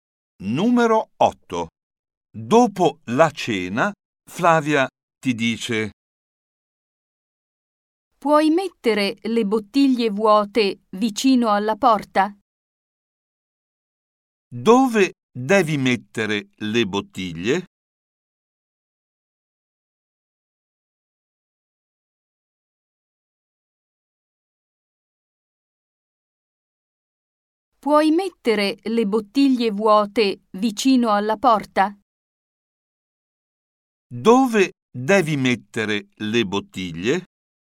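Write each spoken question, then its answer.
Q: Dove devi mettere le bottiglie?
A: vicino alla porta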